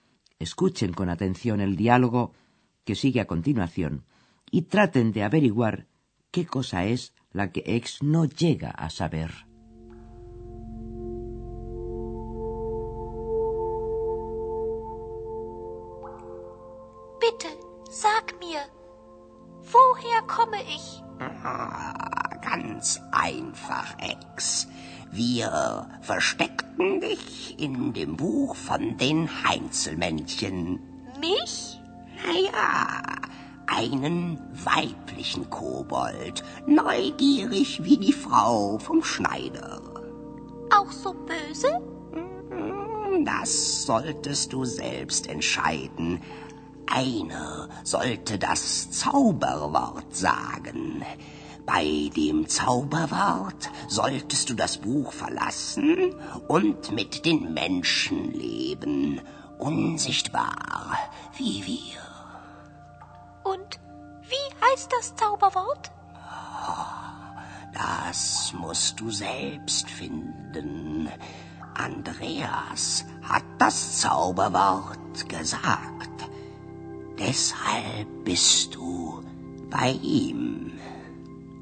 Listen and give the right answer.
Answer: Pero Ex no logra averiguar cuál es esa palabra mágica.